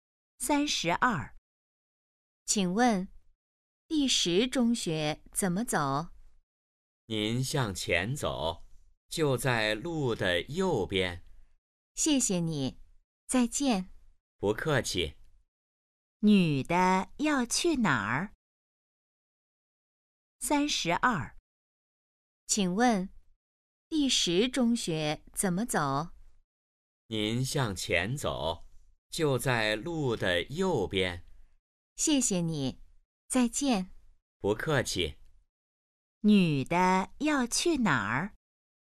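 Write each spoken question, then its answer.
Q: 女的要去哪儿?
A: 第十中学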